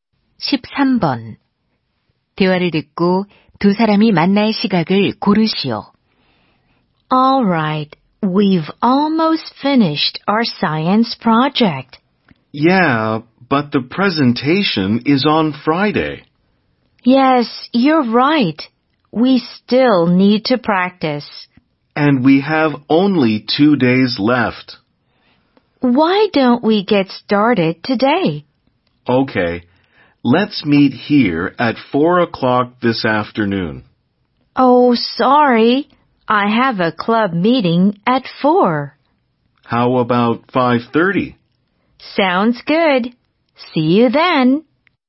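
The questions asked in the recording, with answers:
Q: 대화를 듣고 두 사람이 만날 시각을 고르시오.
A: 5시 30분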